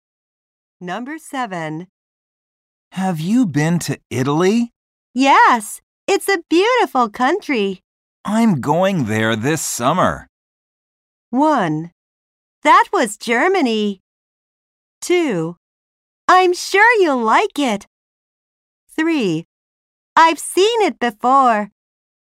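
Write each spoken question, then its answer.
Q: I'm going there this summer.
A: 2: I'm sure you'll like it.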